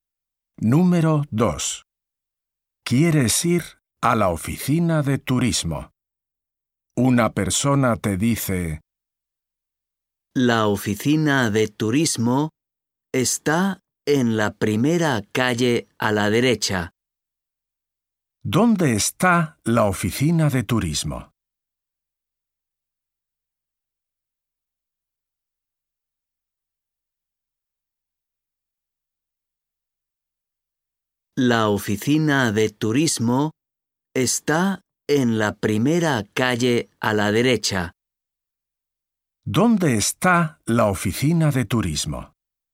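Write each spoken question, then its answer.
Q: ¿Dónde está la oficina de turismo?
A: En la primera calle a la derecha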